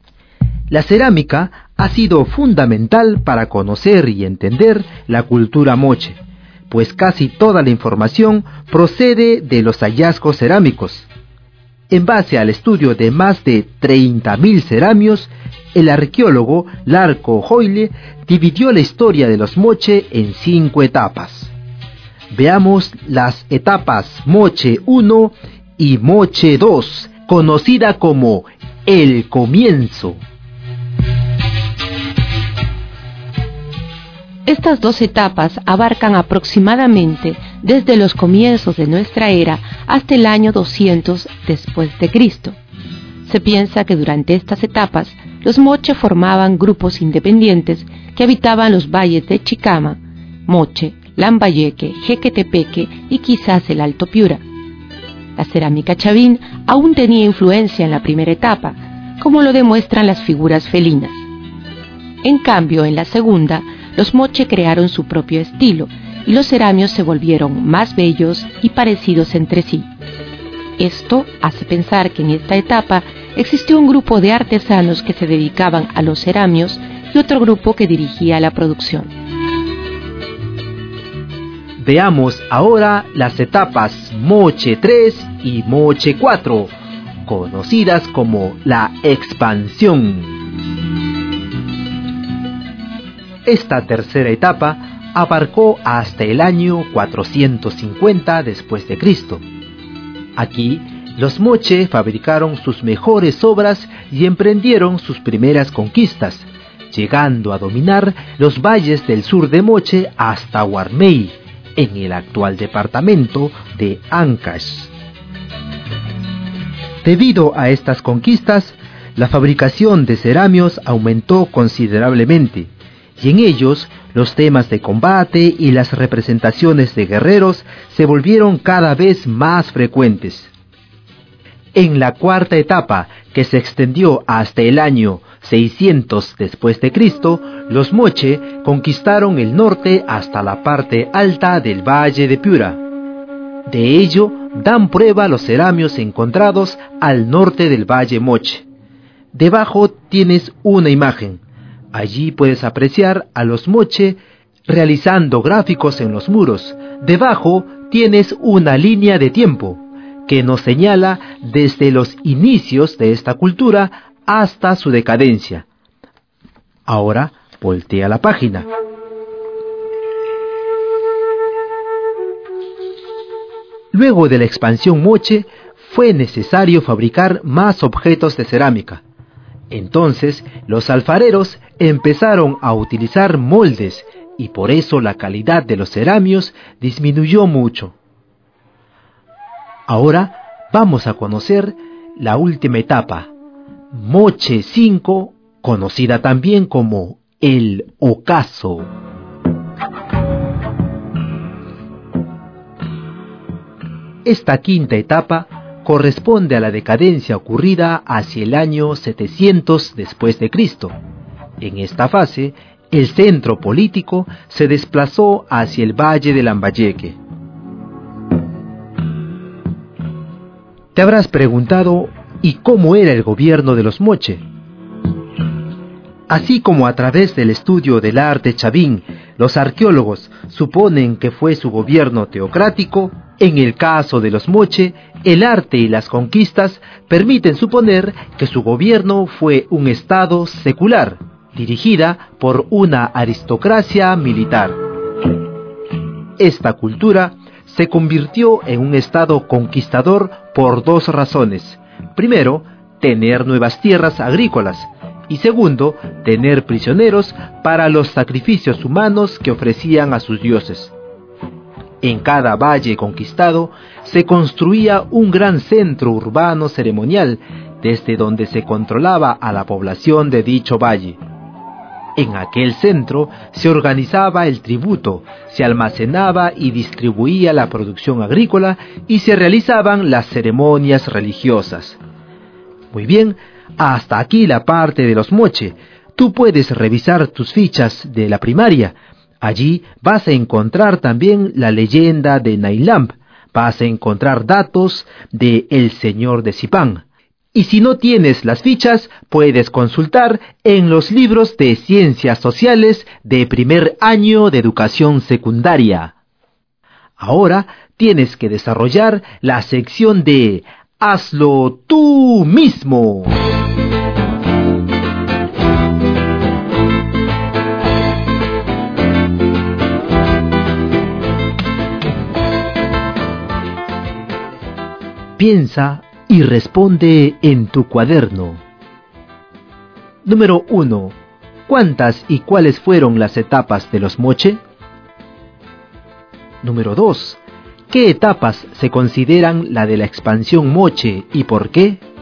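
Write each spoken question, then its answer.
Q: ¿Cuántas y cuáles fueron las etapas de los Moche?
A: Cinco: Moche 1 y 2 (el comienzo), Moche 3 y 4 (la expansión) y Moche 5 (el ocaso)

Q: ¿Qué etapas se consideran la de la expansión Moche y por qué?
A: Moche 3 y Moche 4, porque en ellas conquistaron los valles del sur hasta Huarmey y luego el norte hasta el Alto Piura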